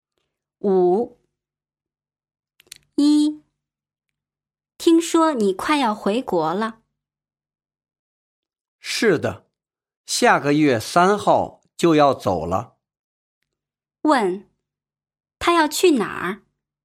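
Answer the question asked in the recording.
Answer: 回国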